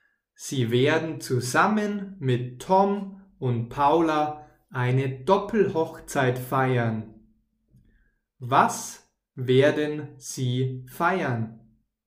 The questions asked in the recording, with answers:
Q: Was werden sie feiern?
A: eine Doppelhochzeit. Sie werden eine Doppelhochzeit feiern.